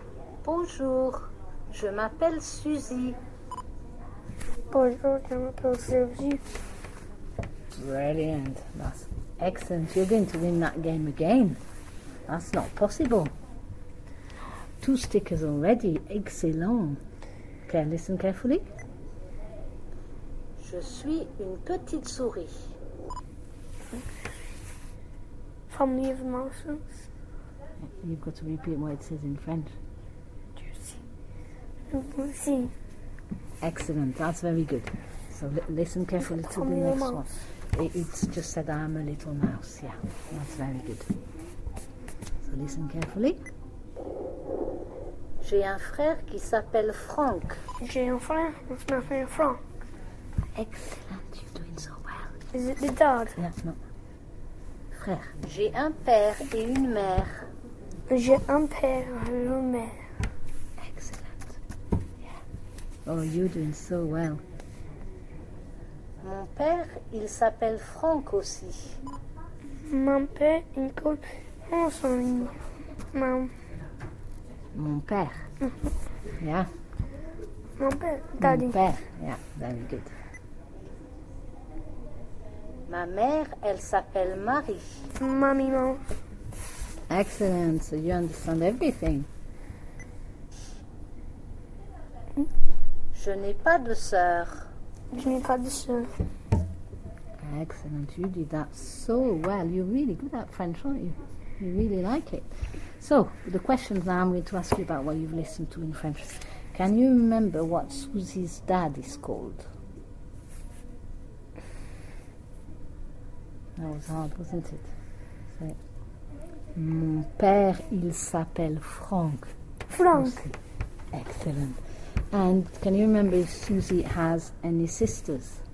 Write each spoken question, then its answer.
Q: Can you remember what Susie's dad is called?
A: Mon père, il s'appelle Franck.

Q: And can you remember if Susie has any sisters?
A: Je n'ai pas de sœur.